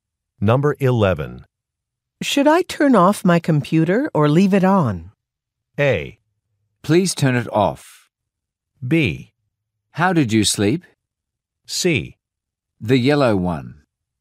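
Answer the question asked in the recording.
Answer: A: Please turn it off.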